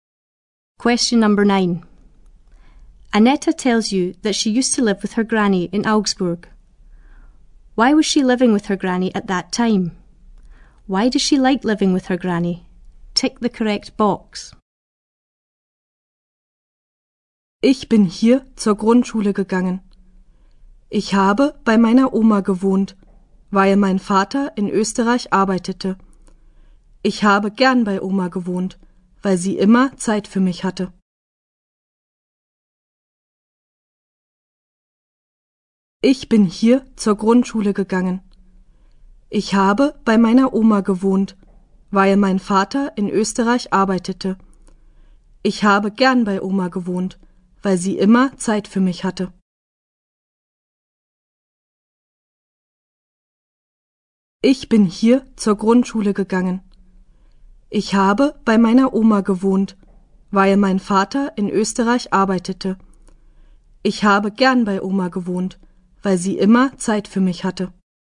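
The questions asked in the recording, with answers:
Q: Why was she living with her granny at that time?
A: Her father was working in Austria

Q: Why does she like living with her granny?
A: Her granny always had time for her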